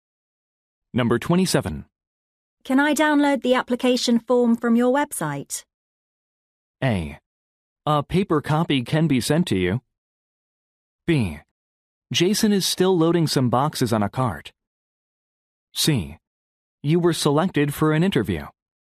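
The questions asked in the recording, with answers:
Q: Can I download the application form from your website?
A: A: A paper copy can be sent to you.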